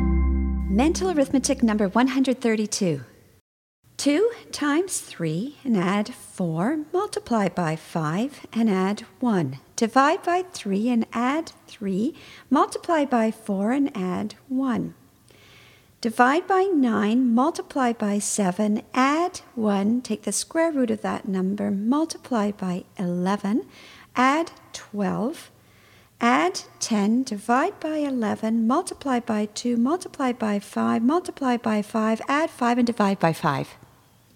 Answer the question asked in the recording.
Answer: And the answer is 101.